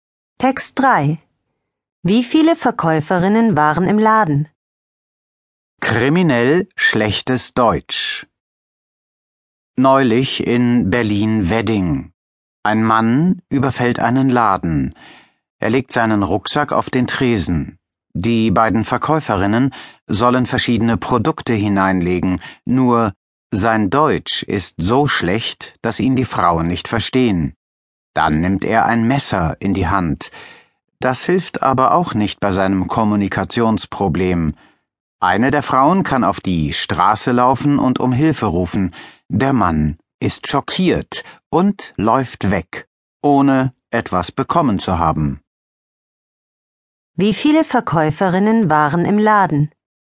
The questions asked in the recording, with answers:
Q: Wie viele Verkäuferinnen waren im Laden?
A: Zwei Verkäuferinnen.